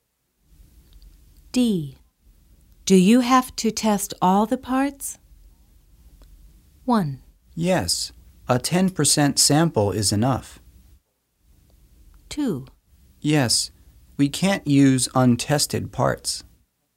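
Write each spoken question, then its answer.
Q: Do you have to test all the parts?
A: 2: Yes, we can't use untested parts.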